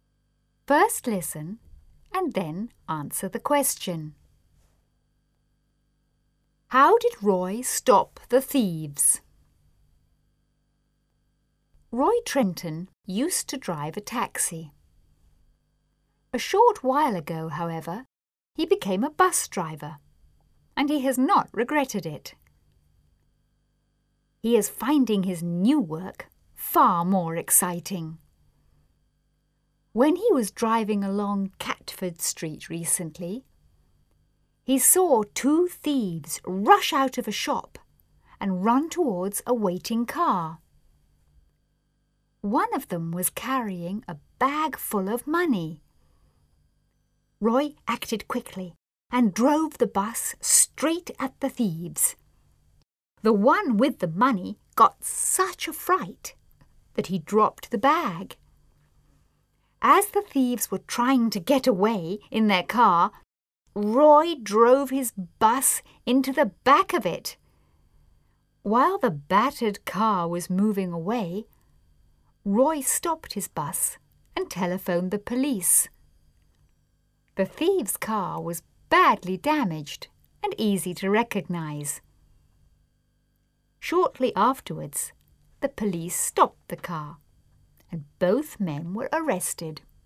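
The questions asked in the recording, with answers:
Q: How did Roy stop the thieves?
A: He drove his bus straight at them and then into the back of their car.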